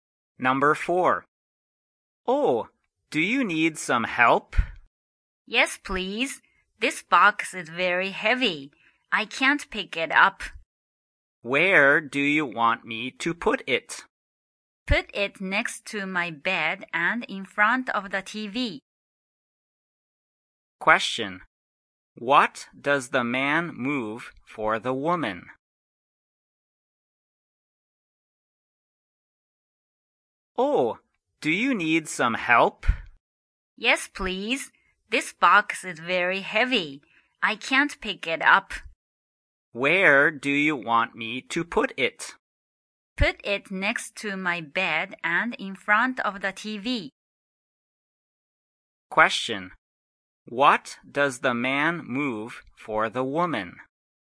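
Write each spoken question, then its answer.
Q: What does the man move for the woman?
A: A heavy box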